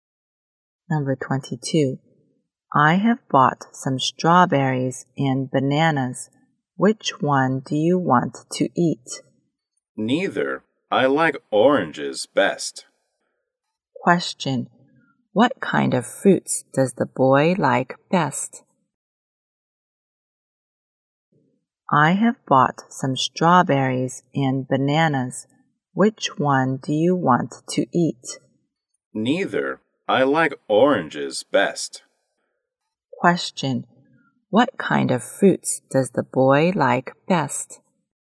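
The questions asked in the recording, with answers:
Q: Question. What kind of fruits does the boy like best?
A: Oranges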